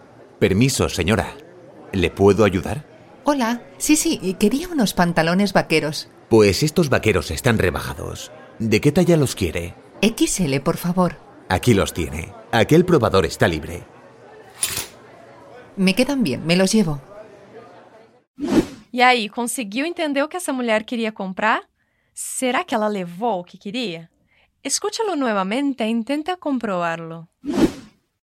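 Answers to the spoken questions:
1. Unos pantalones vaqueros (talla XL)
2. Sí, le quedan bien y se los lleva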